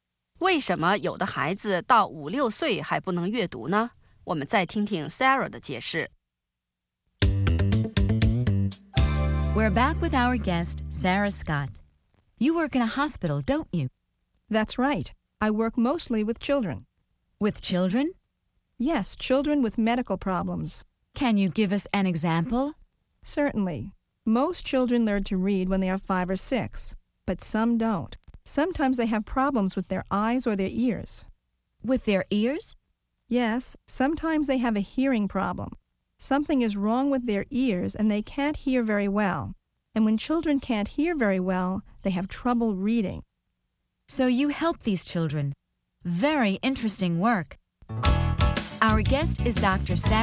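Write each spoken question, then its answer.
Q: Why do some children up to 5 or 6 years old still can't read?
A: They have problems with their eyes or ears, such as a hearing problem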